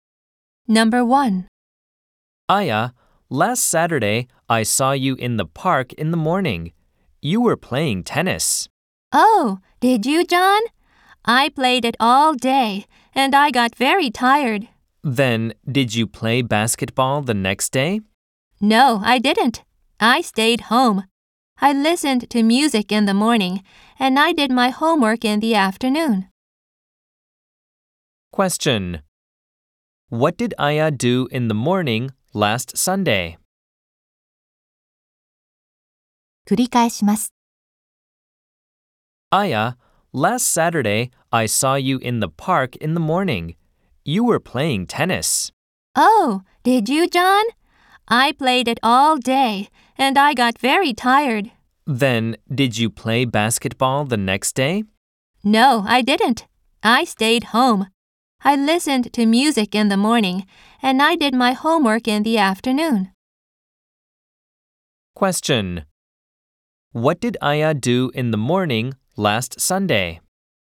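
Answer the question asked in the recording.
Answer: She listened to music.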